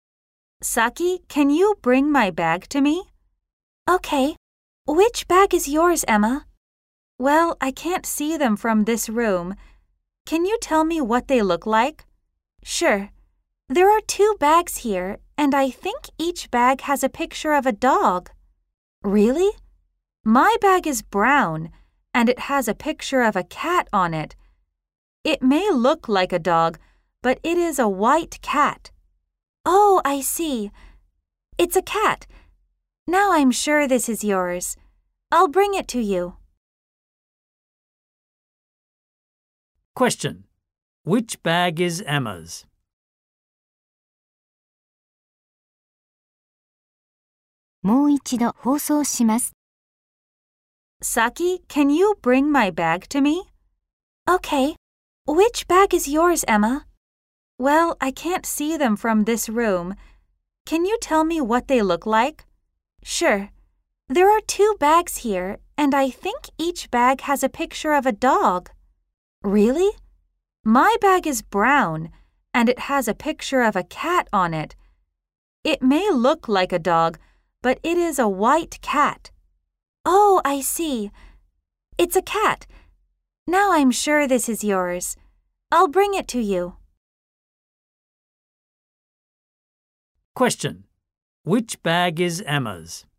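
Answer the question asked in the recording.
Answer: The brown bag with a picture of a white cat on it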